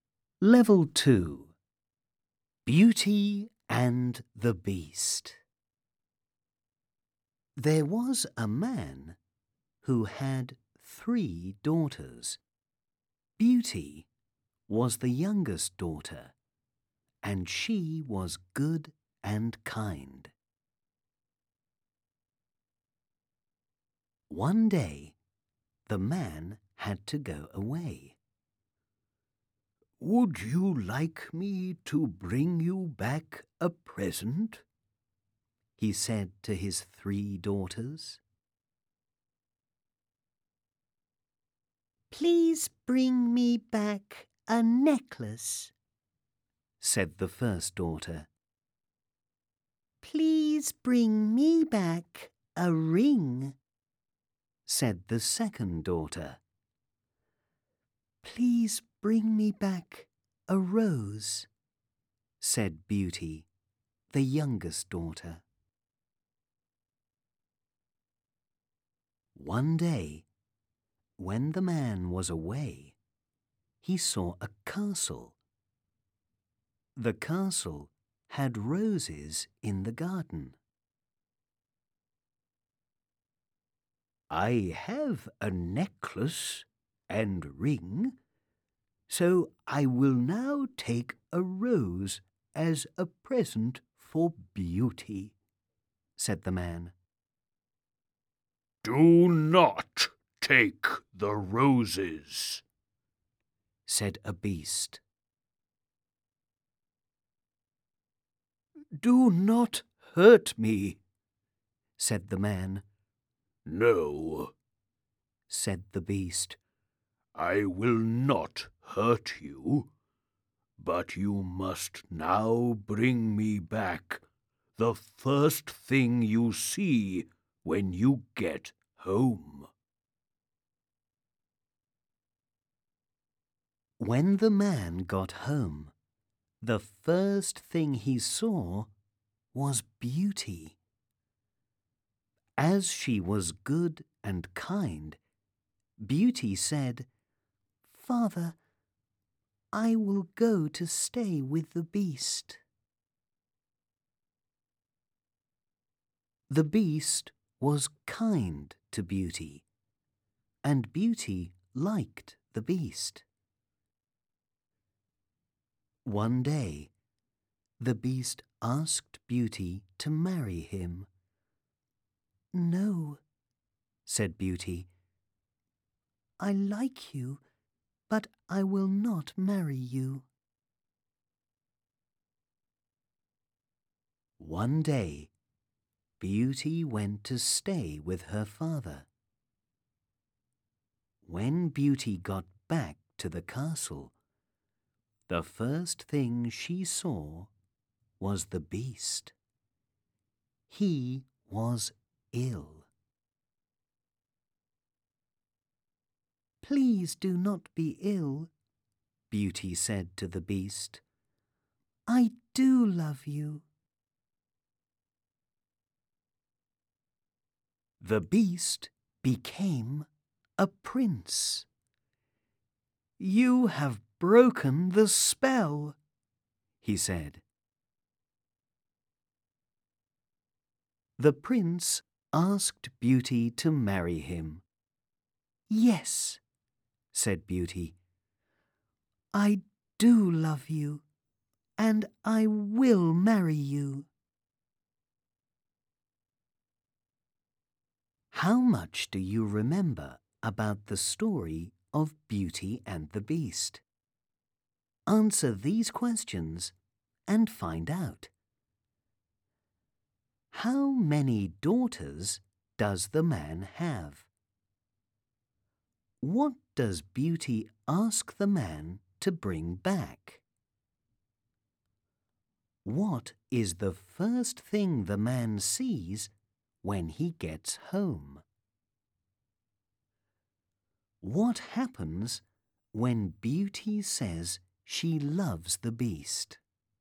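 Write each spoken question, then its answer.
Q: How many daughters does the man have?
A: Three

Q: What does Beauty ask the man to bring back?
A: A rose

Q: What is the first thing the man sees when he gets home?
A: Beauty

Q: What happens when Beauty says she loves the Beast?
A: The Beast becomes a prince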